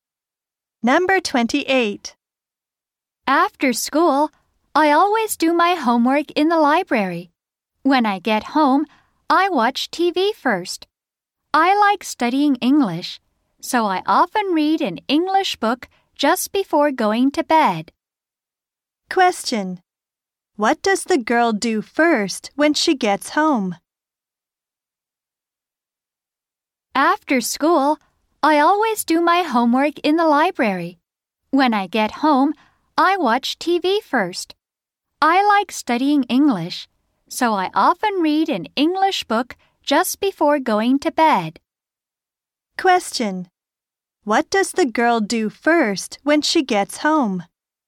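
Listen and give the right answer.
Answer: She watches TV.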